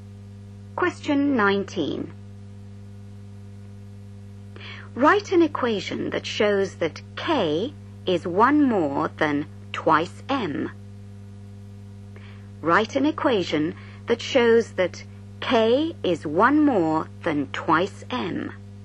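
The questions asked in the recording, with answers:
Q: Write an equation that shows that K is one more than twice M.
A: K = 2M + 1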